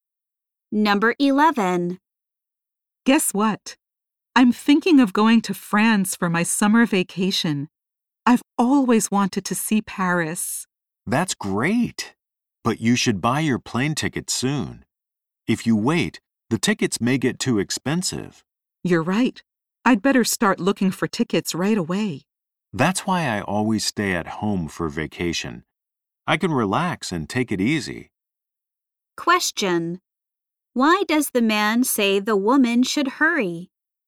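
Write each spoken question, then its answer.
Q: Why does the man say the woman should hurry?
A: Plane tickets may get too expensive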